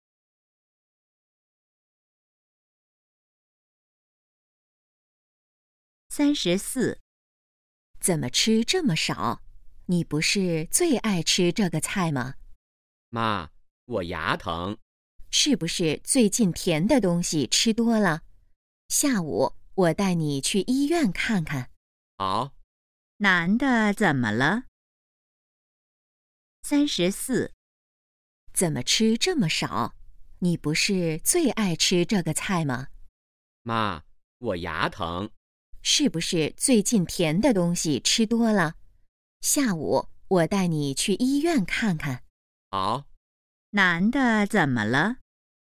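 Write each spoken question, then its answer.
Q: 男的怎么了?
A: 牙疼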